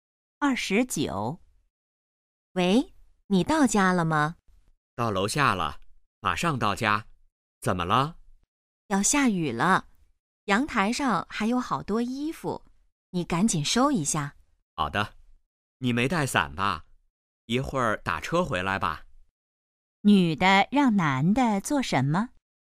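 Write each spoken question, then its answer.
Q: 女的让男的做什么?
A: 收阳台上的衣服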